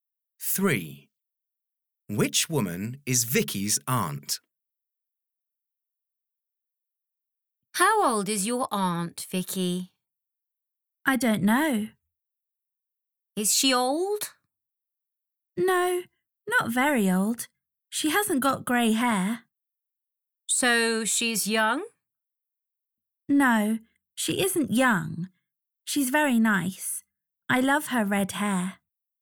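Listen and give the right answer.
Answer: The one with red hair, not young and not old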